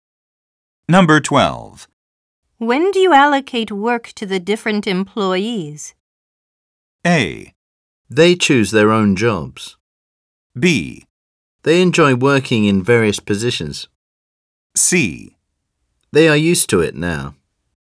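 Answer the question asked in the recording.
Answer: A: They choose their own jobs.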